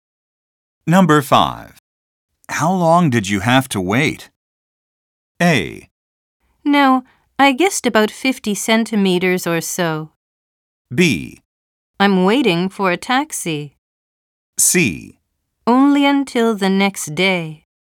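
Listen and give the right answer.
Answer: C: Only until the next day.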